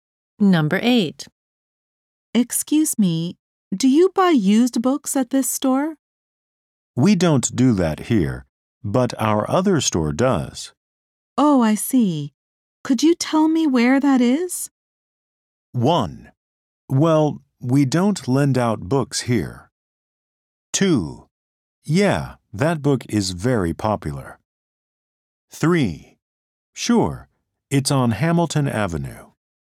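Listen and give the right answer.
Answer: 3: Sure, it's on Hamilton Avenue.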